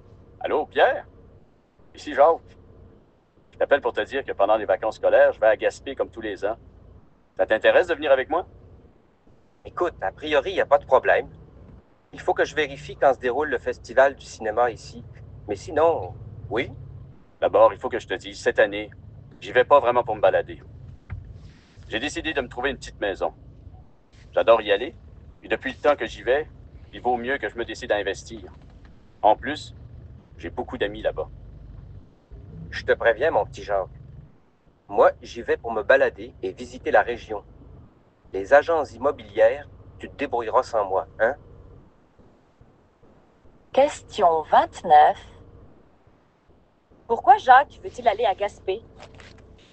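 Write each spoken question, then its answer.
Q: Pourquoi Jacques veut-il aller à Gaspé?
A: Pour se trouver une petite maison (investir dans l'immobilier)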